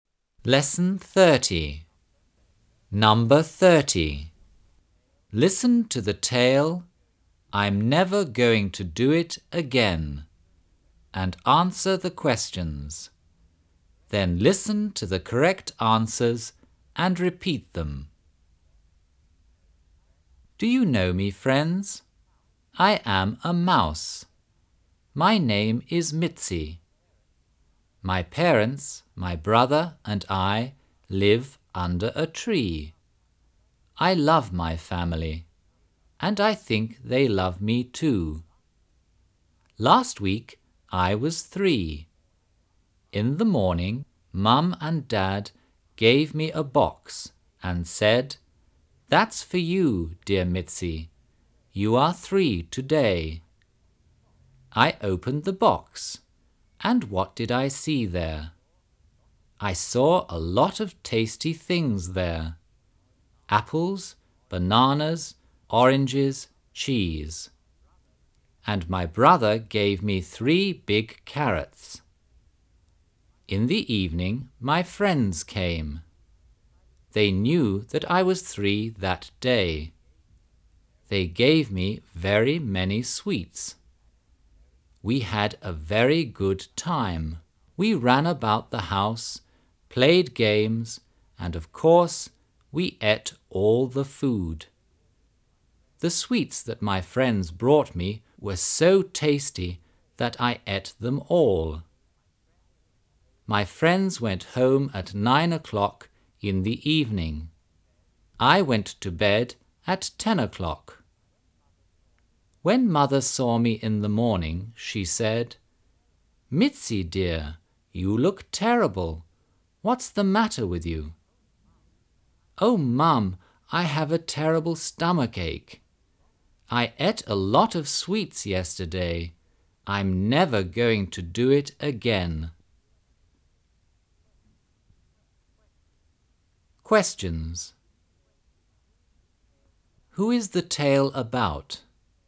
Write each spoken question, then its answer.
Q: Who is the tale about?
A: It's about a mouse.